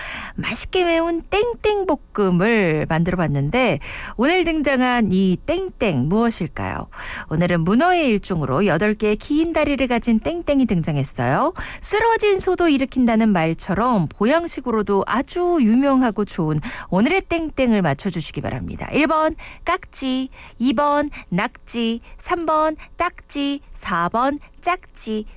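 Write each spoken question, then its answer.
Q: 맛있게 매운 땡땡볶음을 만들어 봤는데 오늘 등장한 이 땡땡 무엇일까요?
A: 2: 낙지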